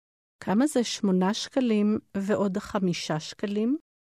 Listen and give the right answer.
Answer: 13 שקלים.